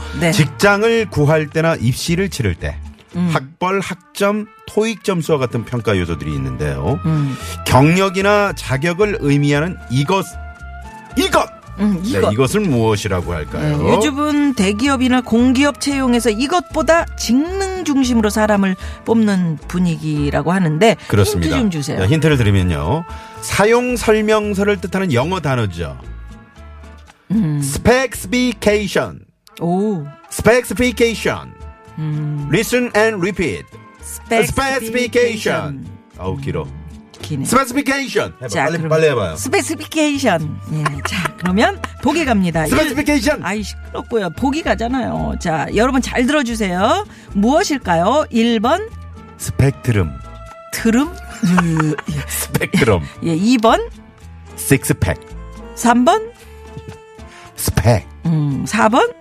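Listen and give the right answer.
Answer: 3: 스펙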